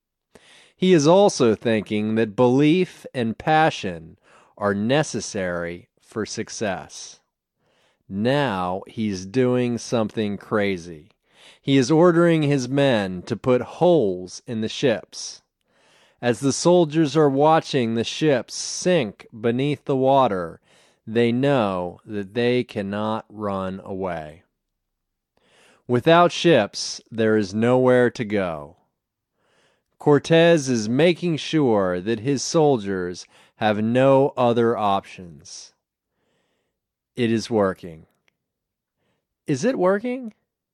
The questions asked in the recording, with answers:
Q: Is it working?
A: Yes, it is working.